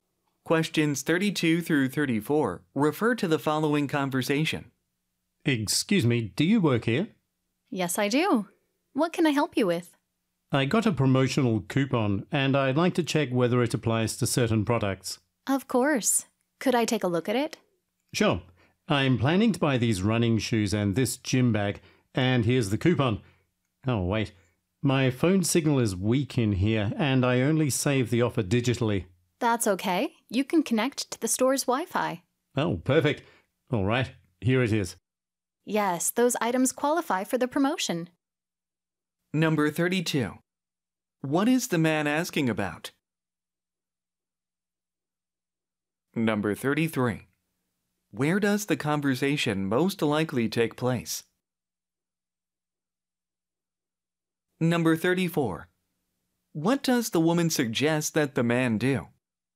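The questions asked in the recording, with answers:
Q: What is the man asking about?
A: Whether his promotional coupon applies to certain products

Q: Where does the conversation most likely take place?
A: In a sporting goods store

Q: What does the woman suggest that the man do?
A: Connect to the store's Wi-Fi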